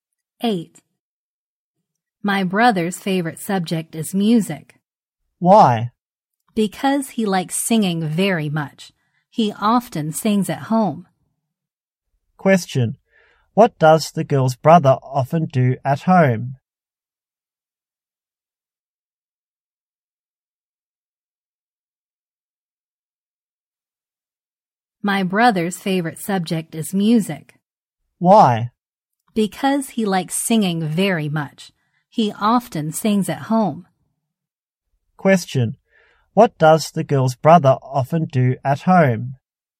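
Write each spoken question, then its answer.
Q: Question. What does the girl's brother often do at home?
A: He sings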